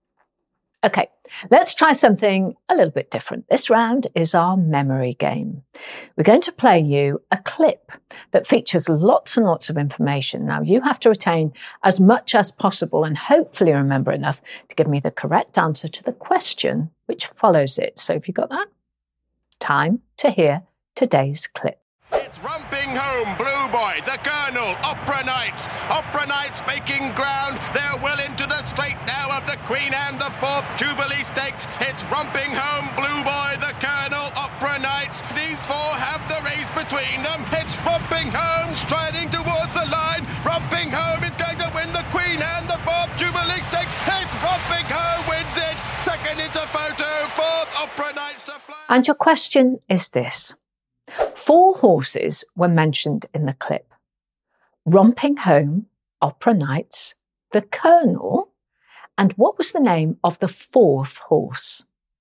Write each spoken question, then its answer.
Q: Four horses were mentioned in the clip. Romping Home, Opera Knights, the Colonel, and what was the name of the fourth horse?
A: And the answer was Blue Boy.